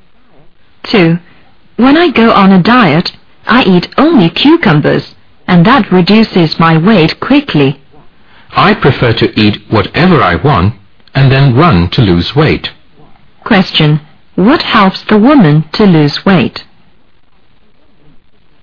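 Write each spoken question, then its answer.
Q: What helps the woman to lose weight?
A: Running (exercise)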